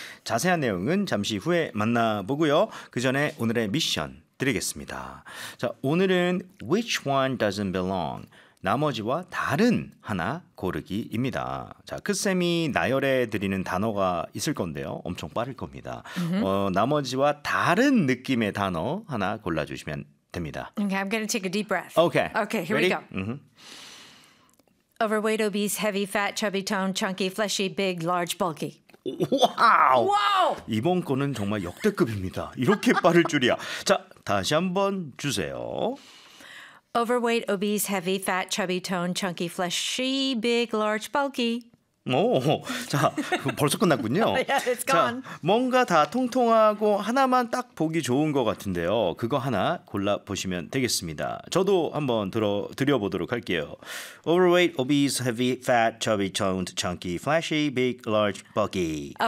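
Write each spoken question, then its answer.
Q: Which one doesn't belong?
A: toned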